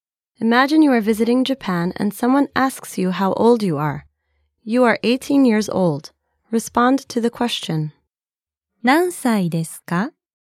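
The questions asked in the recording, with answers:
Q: 何歳ですか?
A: 18歳です。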